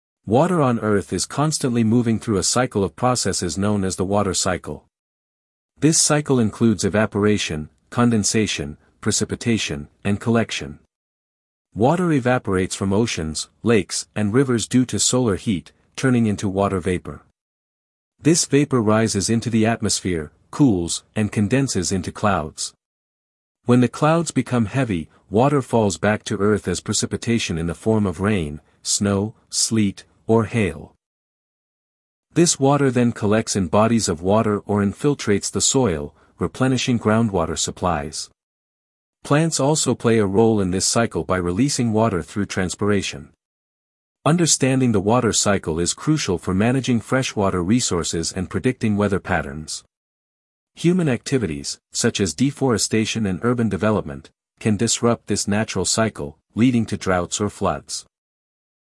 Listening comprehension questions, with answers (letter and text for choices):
Listen to an academic talk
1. What is the main topic of the talk?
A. Weather forecasting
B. The water cycle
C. Ocean currents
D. Climate change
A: B. The water cycle

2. What is the first step in the water cycle mentioned?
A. Precipitation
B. Evaporation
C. Collection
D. Condensation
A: B. Evaporation

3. How can humans affect the water cycle?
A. By planting trees only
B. Through deforestation and urban development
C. By fishing in rivers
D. Through evaporation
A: B. Through deforestation and urban development

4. What can be inferred about plants in the water cycle?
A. They have no effect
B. They contribute through transpiration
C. They increase rainfall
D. They prevent evaporation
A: B. They contribute through transpiration

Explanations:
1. The talk explains the processes of the water cycle and its importance.
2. Water evaporates first due to solar heat.
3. Human activities can disrupt natural water flow.
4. Plants release water into the atmosphere, aiding the cycle.

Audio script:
Water on Earth is constantly moving through a cycle of processes known as the water cycle. This cycle includes evaporation, condensation, precipitation, and collection. Water evaporates from oceans, lakes, and rivers due to solar heat, turning into water vapor. This vapor rises into the atmosphere, cools, and condenses into clouds.
When the clouds become heavy, water falls back to Earth as precipitation in the form of rain, snow, sleet, or hail. This water then collects in bodies of water or infiltrates the soil, replenishing groundwater supplies. Plants also play a role in this cycle by releasing water through transpiration.
Understanding the water cycle is crucial for managing freshwater resources and predicting weather patterns. Human activities, such as deforestation and urban development, can disrupt this natural cycle, leading to droughts or floods